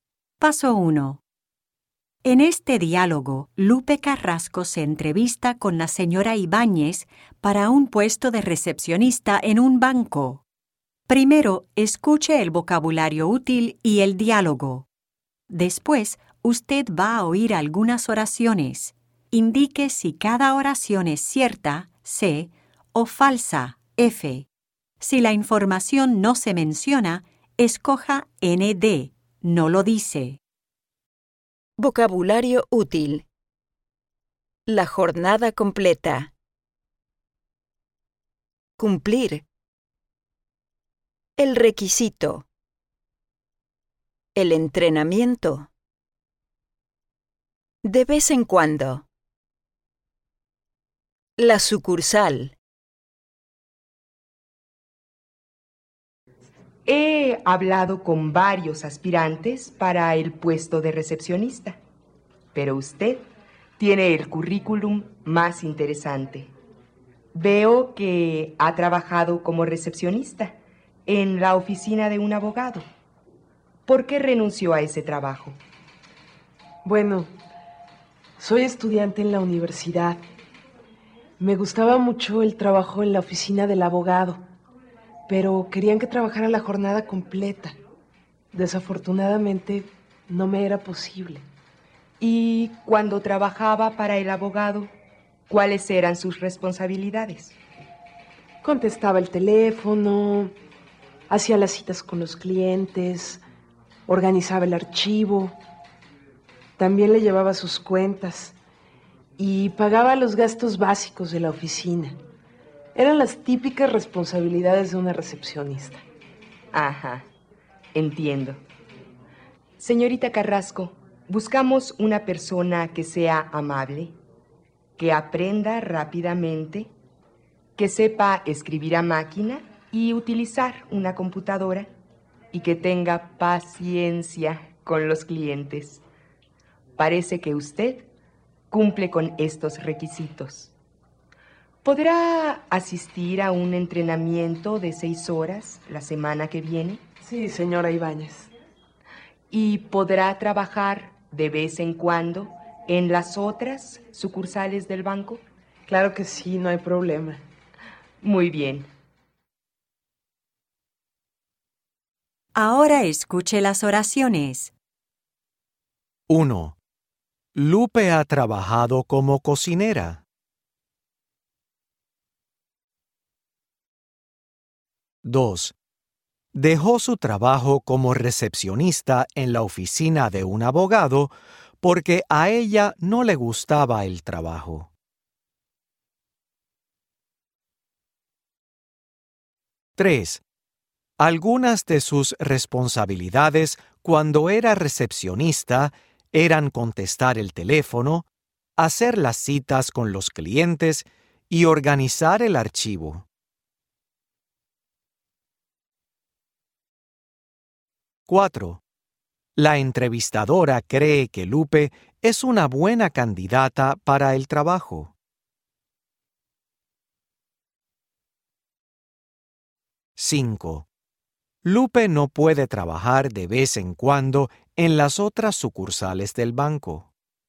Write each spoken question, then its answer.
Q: Lupe ha trabajado como cocinera.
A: ND